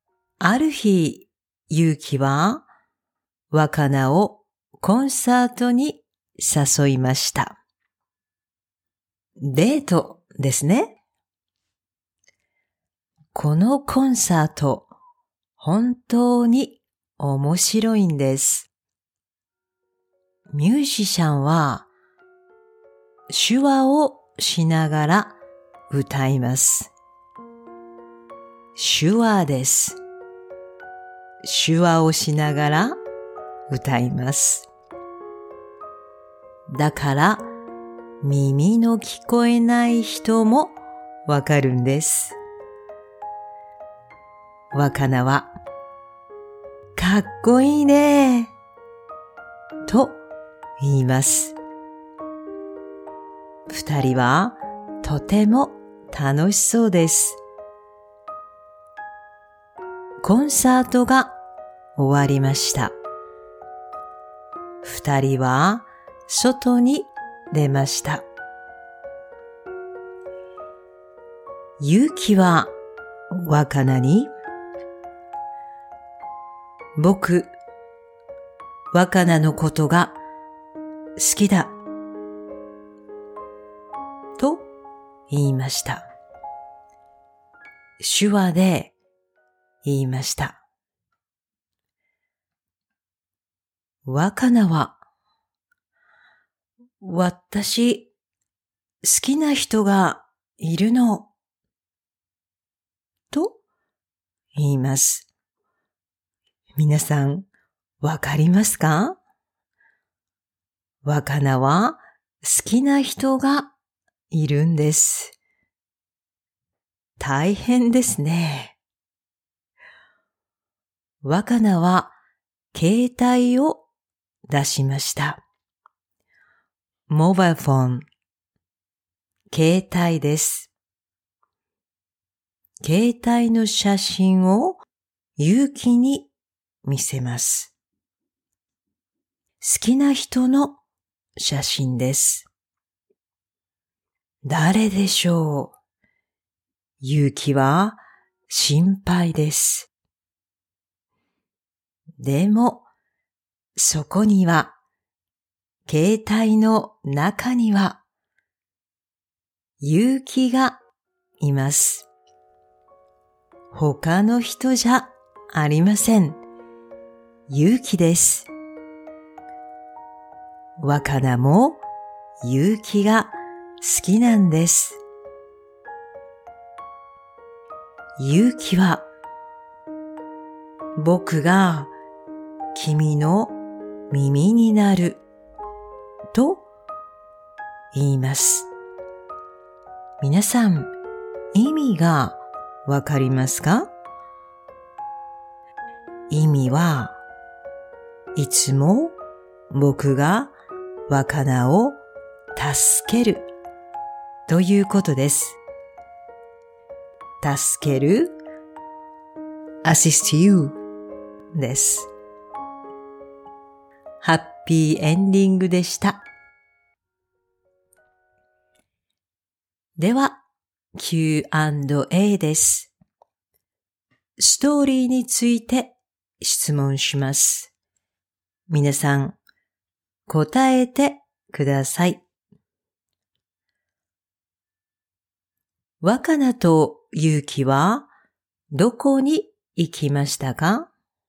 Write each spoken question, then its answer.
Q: 若菜とユウキはどこに行きましたか?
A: コンサートです。コンサートに行きました。